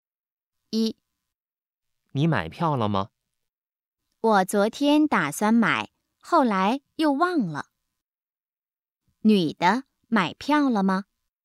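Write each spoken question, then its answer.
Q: 女的买票了吗?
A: 没买,忘了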